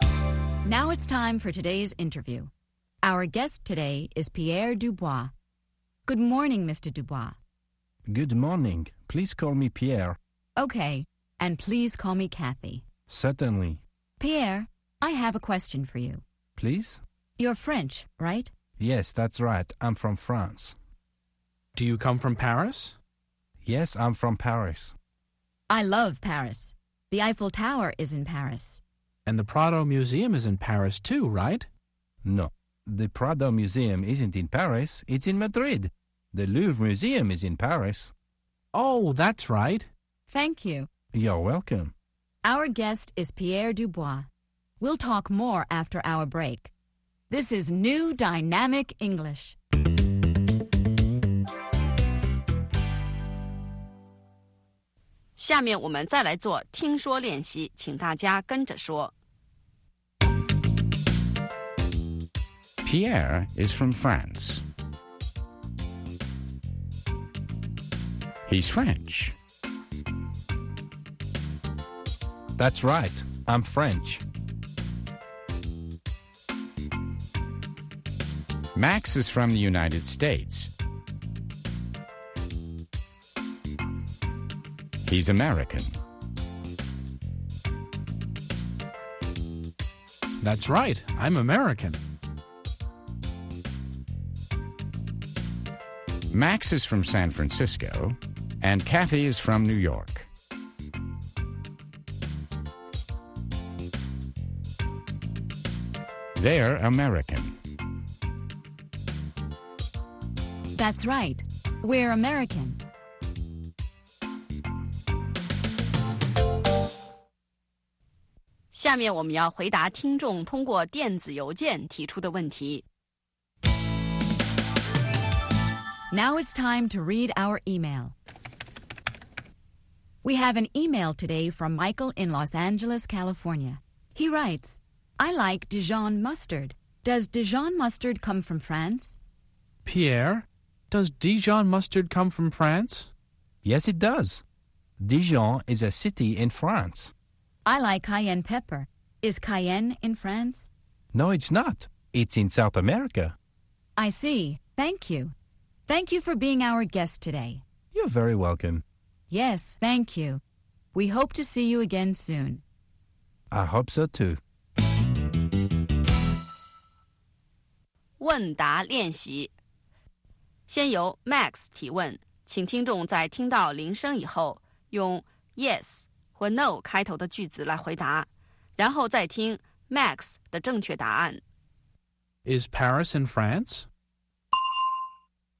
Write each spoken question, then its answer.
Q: Is Paris in France?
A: Yes, it is. Paris is in France.